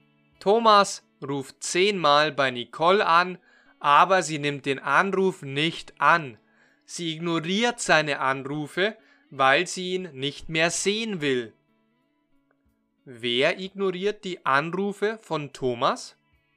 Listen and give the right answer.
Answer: Nicole, sie ignoriert seine Anrufe.